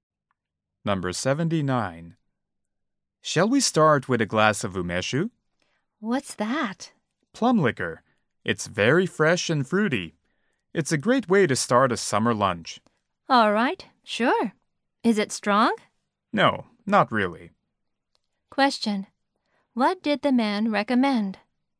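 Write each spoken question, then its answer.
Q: What did the man recommend?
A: A glass of umeshu (plum liquor)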